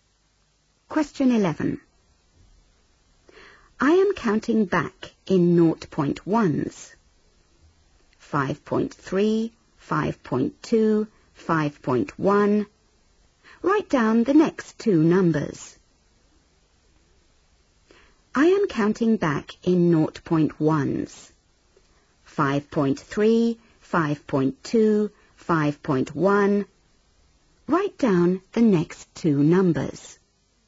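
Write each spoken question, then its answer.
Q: Write down the next two numbers.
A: 5.0, 4.9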